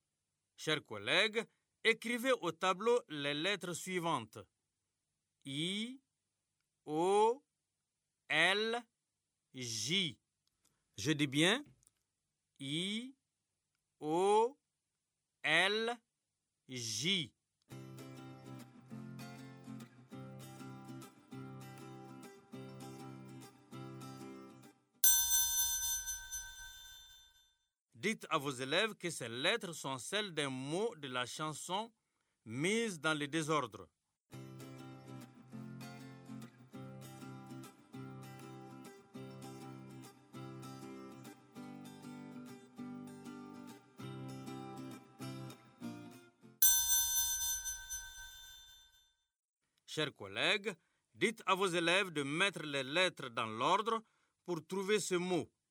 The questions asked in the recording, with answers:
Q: dites à vos élèves de mettre les lettres dans l'ordre pour trouver ce mot.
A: Joli, monsieur.